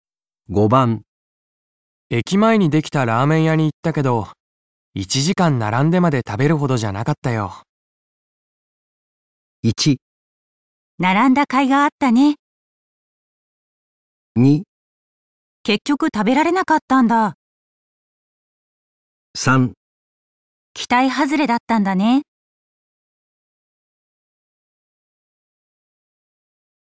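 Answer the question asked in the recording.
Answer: 期待外れだったんだね

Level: N1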